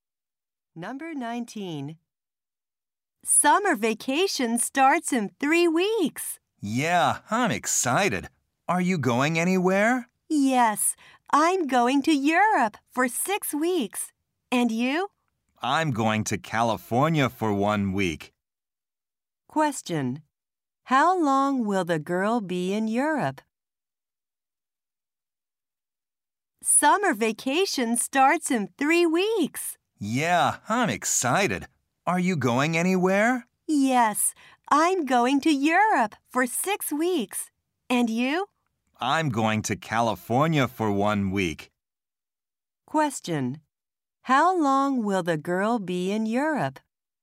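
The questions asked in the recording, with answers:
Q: How long will the girl be in Europe?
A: Six weeks.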